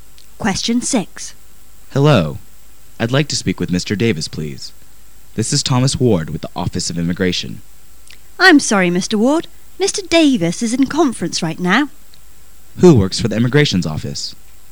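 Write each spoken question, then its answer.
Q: Who works for the Immigration's office?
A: Thomas Ward

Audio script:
[解析] M: Hello. I'd like to speak with Mr. Davis, please. This is Thomas Ward with the Office of Immigration. W: I'm sorry, Mr. Ward. Mr. Davis is in conference right now. Q: who works for the Immigrations Office?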